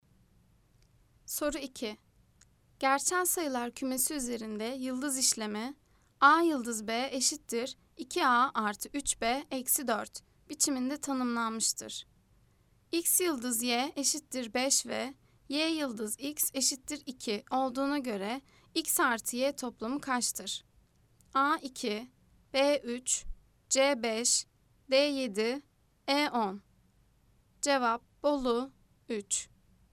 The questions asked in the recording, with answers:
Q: X yıldız Y eşittir 5 ve Y yıldız X eşittir 2 olduğuna göre X artı Y toplamı kaçtır?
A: Cevap Bolu 3.